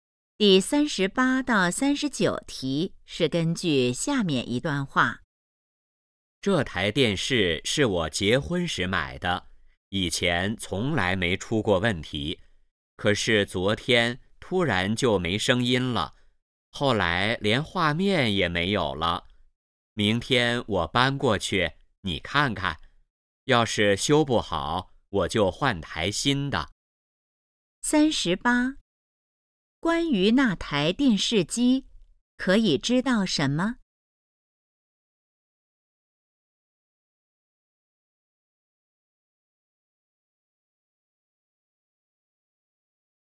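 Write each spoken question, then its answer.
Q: 关于那台电视机,可以知道什么?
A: 是结婚时买的,突然没声音、没画面了

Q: 说话人打算怎么做?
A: 先修,修不好就换台新的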